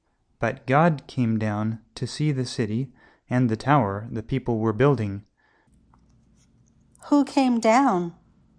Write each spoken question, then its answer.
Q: Who came down?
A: God came down.